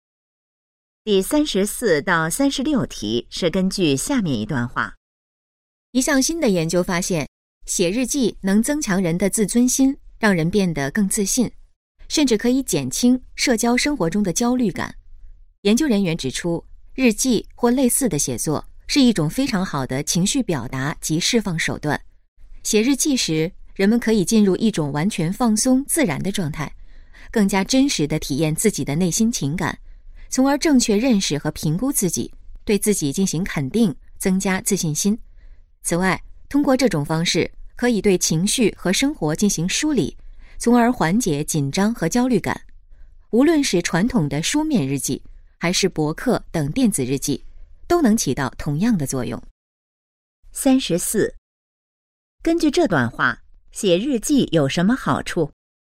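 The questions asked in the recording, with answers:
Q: 根据这段话,写日记有什么好处?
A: 能增强自尊心,让人更自信,减轻焦虑感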